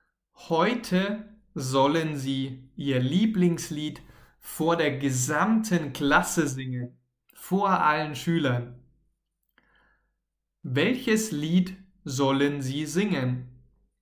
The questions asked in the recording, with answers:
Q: Welches Lied sollen sie singen?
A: Ihr Lieblingslied. Sie sollen heute ihr Lieblingslied singen.